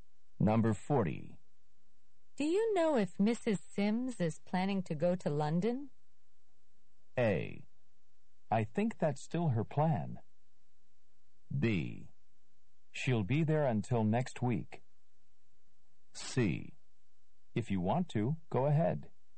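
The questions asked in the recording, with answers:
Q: Do you know if Mrs. Sims is planning to go to London?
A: A: I think that's still her plan.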